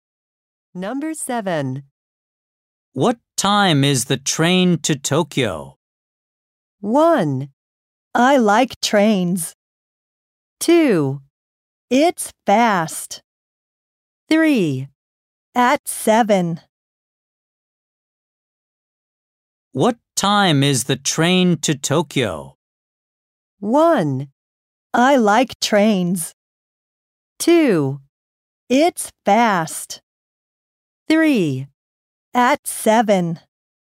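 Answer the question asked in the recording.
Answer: 3: At 7.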